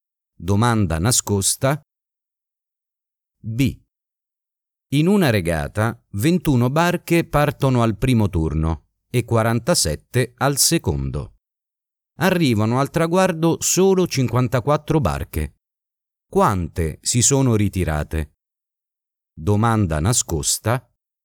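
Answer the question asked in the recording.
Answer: 14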